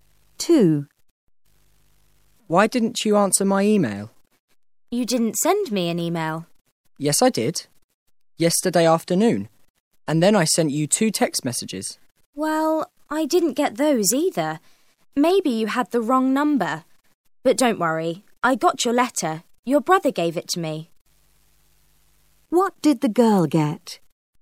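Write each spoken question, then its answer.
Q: What did the girl get?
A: A letter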